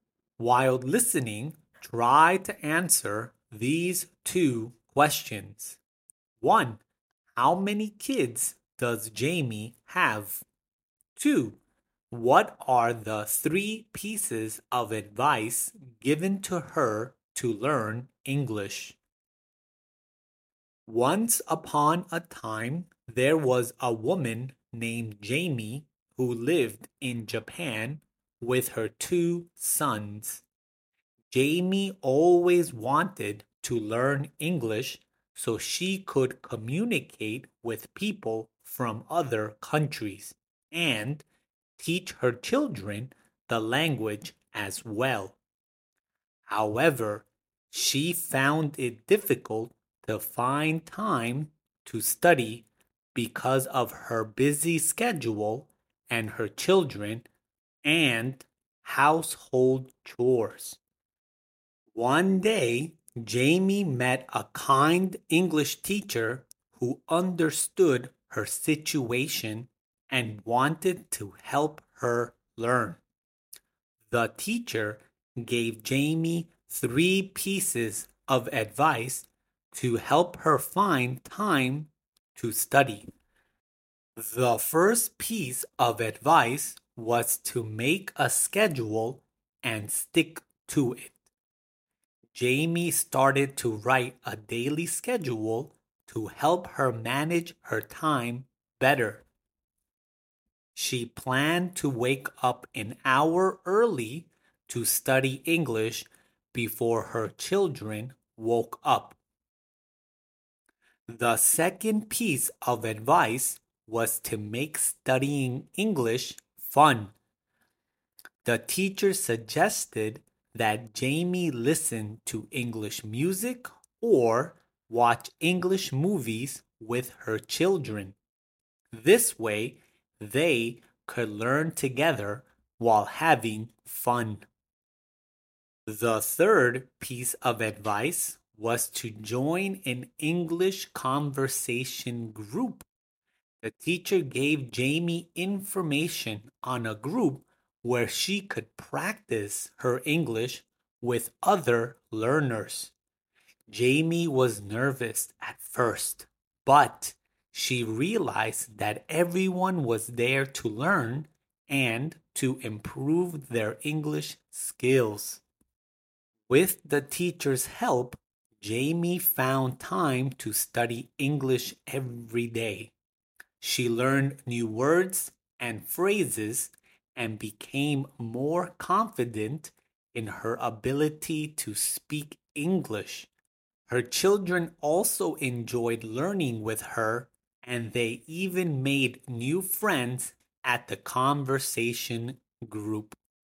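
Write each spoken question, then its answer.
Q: How many kids does Jaimie have?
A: Two

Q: What are the 3 pieces of advice given to her to learn English?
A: Make a schedule and stick to it; make studying English fun; join an English conversation group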